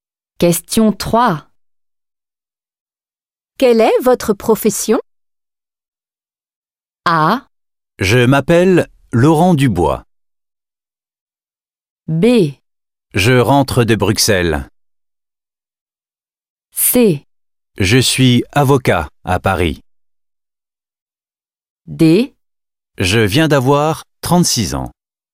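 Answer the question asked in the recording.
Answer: C: Je suis avocat à Paris.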